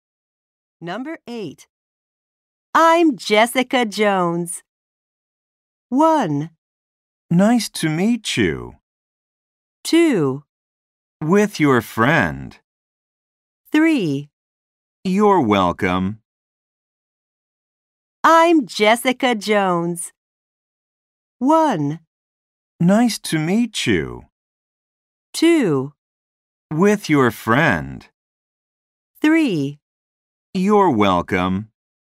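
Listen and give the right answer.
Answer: 1: Nice to meet you.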